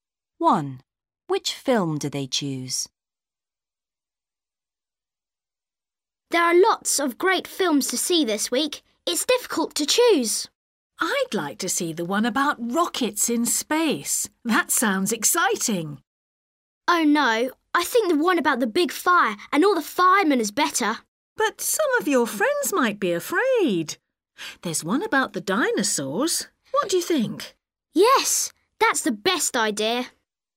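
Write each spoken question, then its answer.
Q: Which film do they choose?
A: The one about dinosaurs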